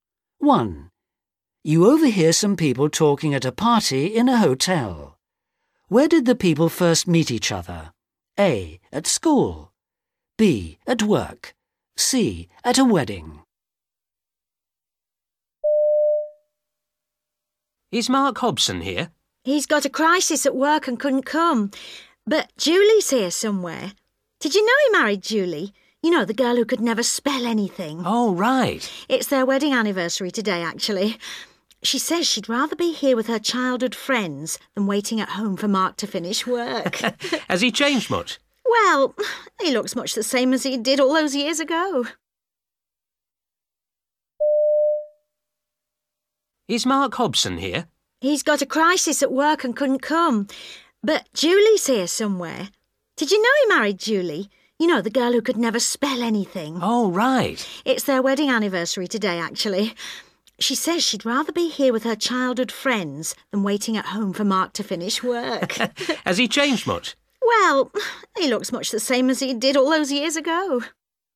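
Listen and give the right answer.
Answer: A: At school.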